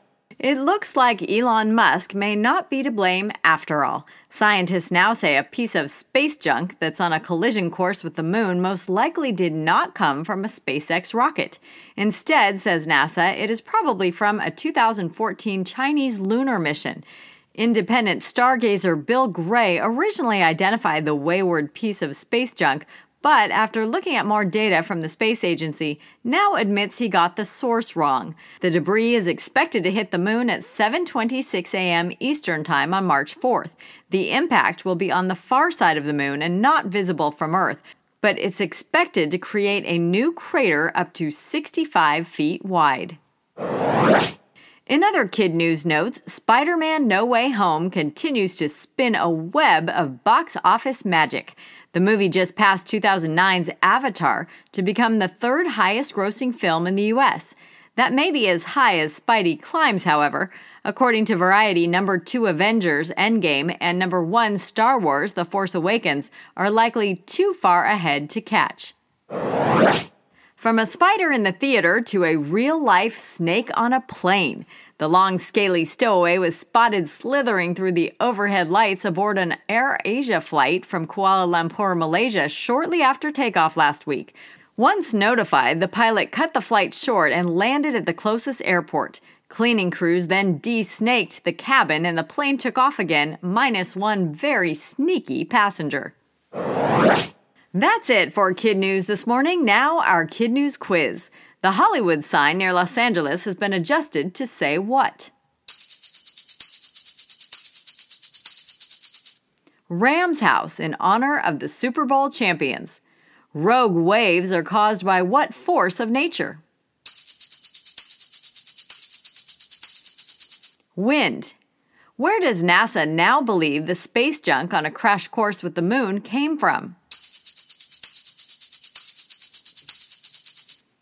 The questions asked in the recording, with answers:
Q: Where does NASA now believe the space junk on a crash course with the moon came from?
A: A Chinese Rocket.